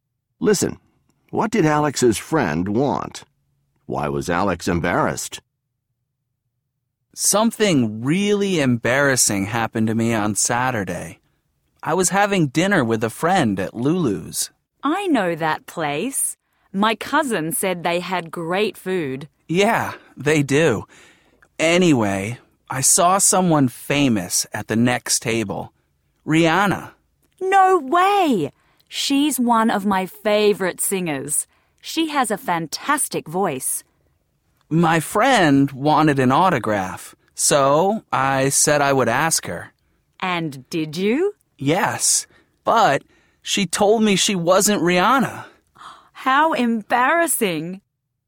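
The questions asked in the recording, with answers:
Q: What did Alex's friend want?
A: An autograph from the woman he thought was Rihanna

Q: Why was Alex embarrassed?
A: The woman he asked told him she wasn't Rihanna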